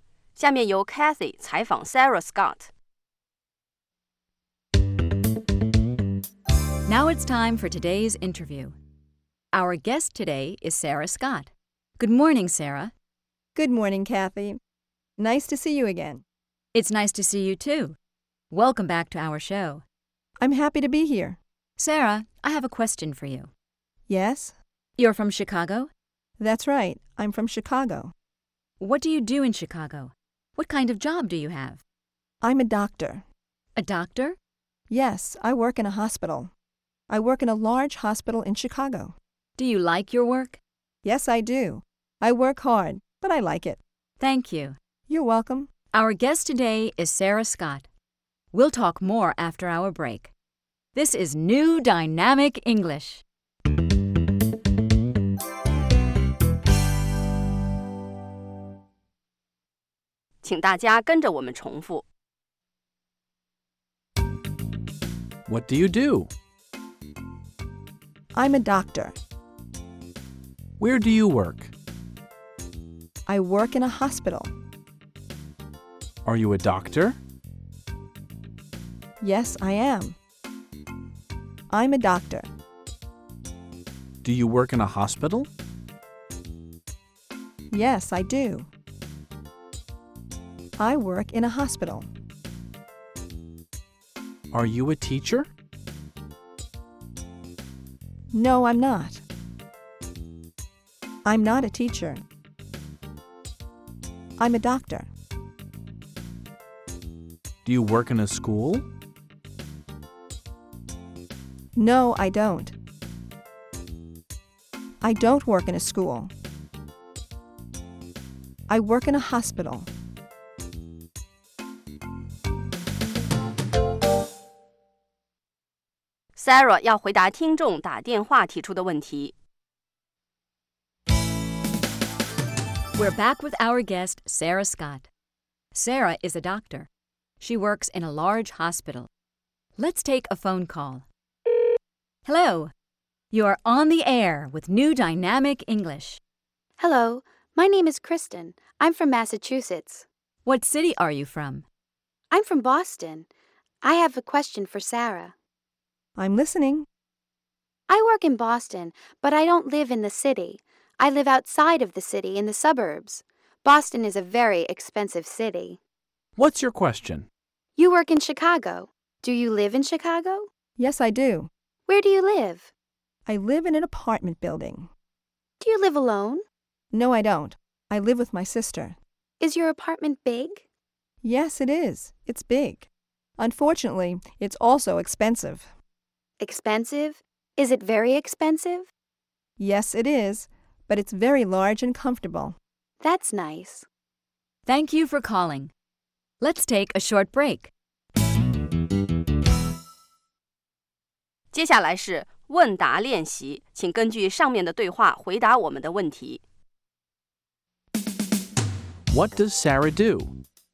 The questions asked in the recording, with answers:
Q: What does Sarah do?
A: She's a doctor.